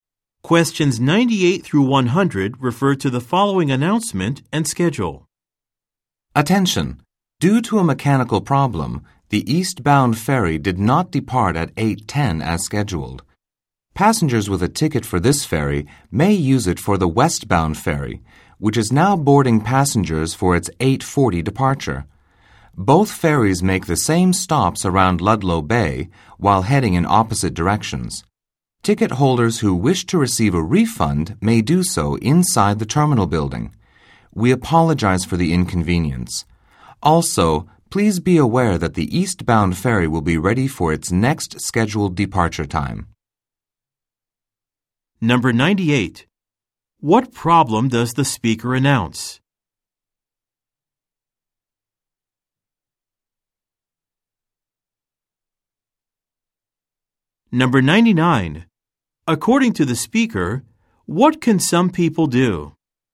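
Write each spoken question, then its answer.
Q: What problem does the speaker announce?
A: A ferry did not depart because of a mechanical problem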